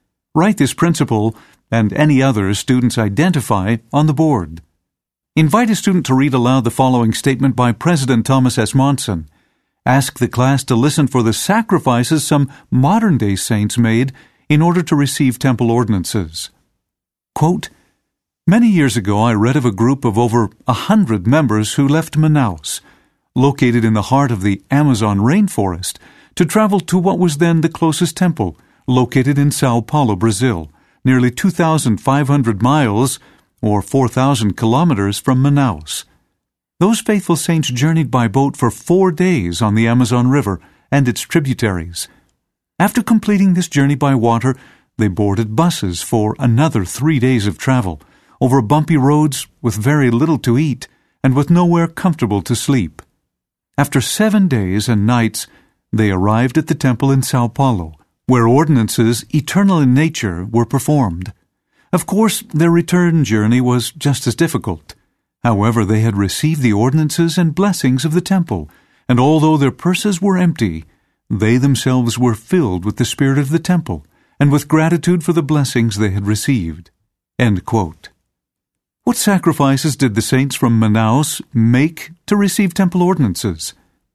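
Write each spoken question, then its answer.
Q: What sacrifices did the saints from Manaus make to receive temple ordinances?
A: They travelled about 4,000 km to São Paulo: 4 days by boat, then 3 days on bumpy roads by bus with little food and nowhere comfortable to sleep, and the same hard trip home, spending all their money.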